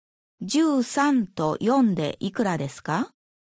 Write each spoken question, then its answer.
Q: 13と4でいくらですか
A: ?17